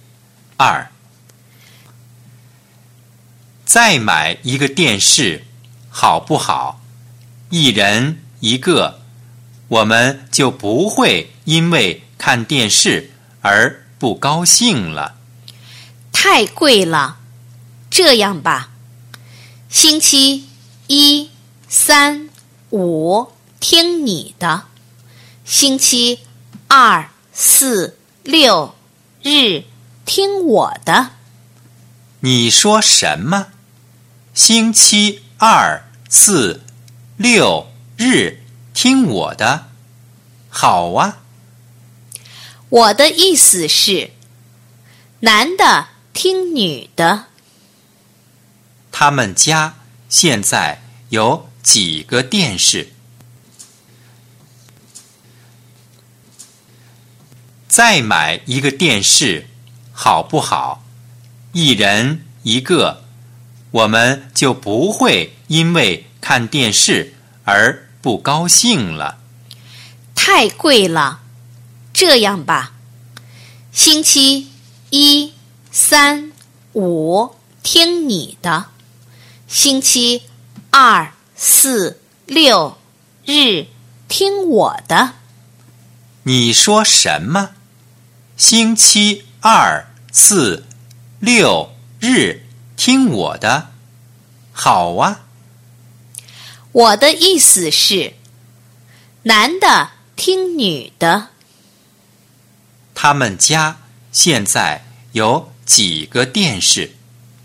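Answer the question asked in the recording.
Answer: 一个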